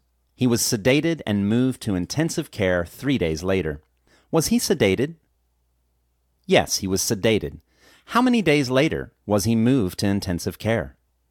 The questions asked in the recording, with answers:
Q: How many days later was he moved to intensive care?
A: He was moved to intensive care 3 days later.